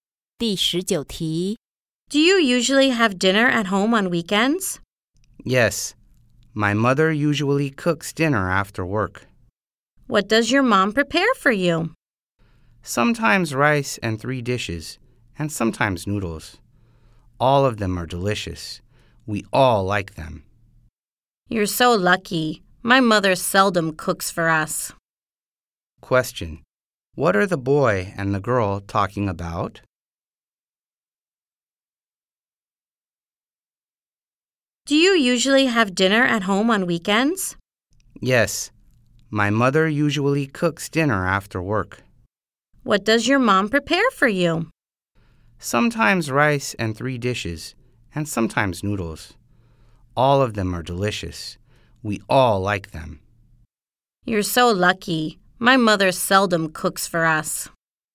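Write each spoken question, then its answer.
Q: What are the boy and the girl talking about?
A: Dinner their mothers cook at home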